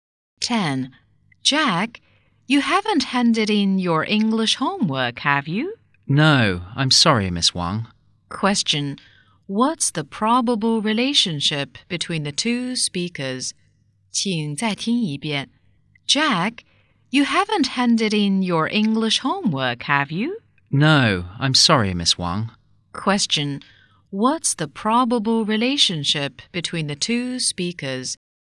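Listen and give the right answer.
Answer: Teacher and student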